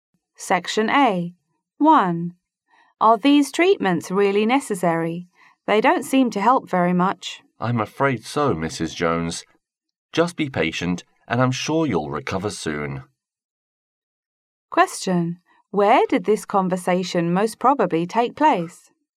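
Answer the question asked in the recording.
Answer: In a hospital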